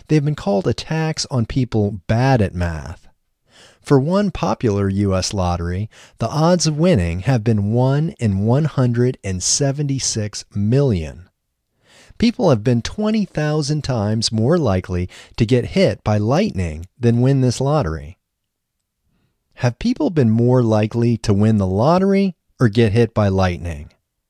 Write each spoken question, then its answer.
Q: Have people been more likely to win the lottery or get hit by lightning?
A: People have been more likely to get hit by lightning than win the lottery.